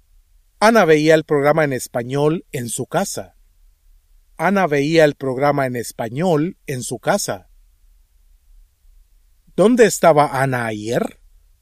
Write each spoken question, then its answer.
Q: ¿Dónde estaba Ana ayer?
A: Ana estaba en su casa.